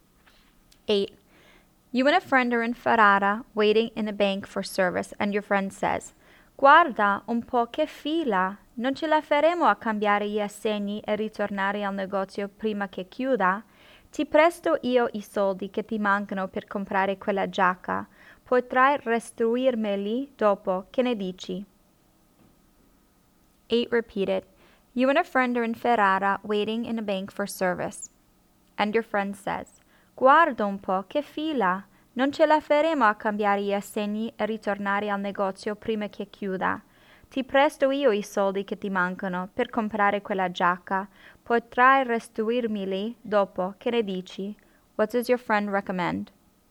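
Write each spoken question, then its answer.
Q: What does your friend recommend?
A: Borrowing money from the friend to buy the jacket and paying it back later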